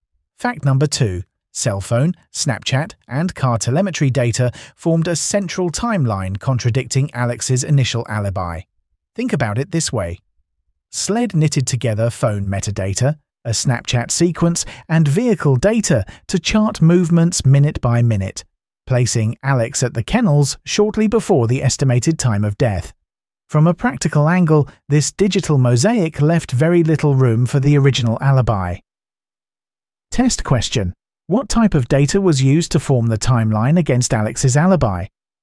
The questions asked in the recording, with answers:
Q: What type of data was used to form the timeline against Alex's alibi?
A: Digital data, including cell phone, Snapchat, and car telemetry.